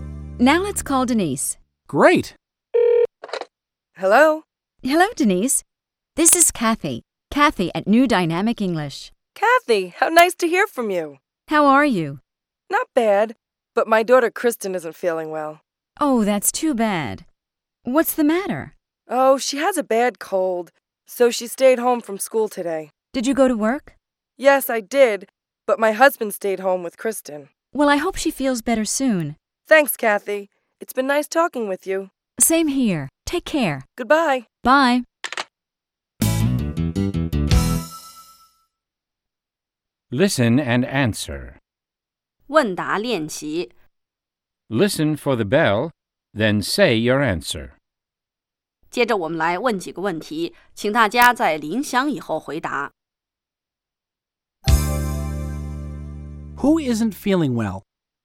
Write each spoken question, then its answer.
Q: Who isn't feeling well?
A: Denise's daughter Kristen isn't feeling well.